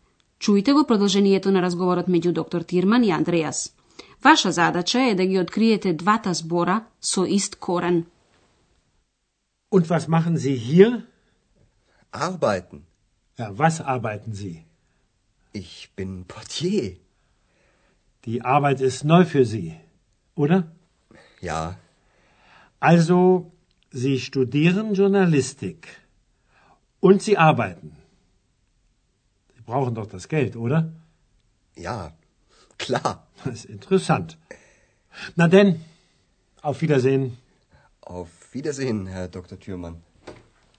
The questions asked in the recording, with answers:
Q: Ваша задача е да ги откриете двата збора со ист корен.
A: Двата збора се работи и работа.